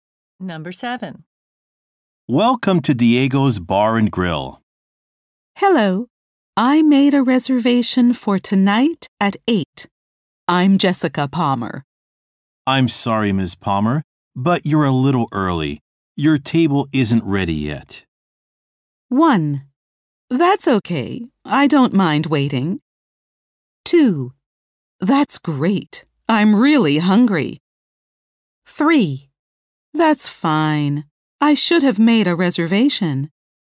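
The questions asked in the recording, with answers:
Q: Your table isn't ready yet.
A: 1: That's okay. I don't mind waiting.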